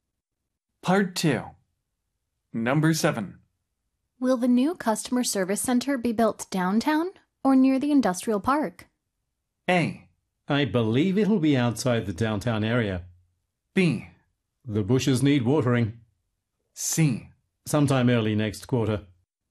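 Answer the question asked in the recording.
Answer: A: I believe it'll be outside the downtown area.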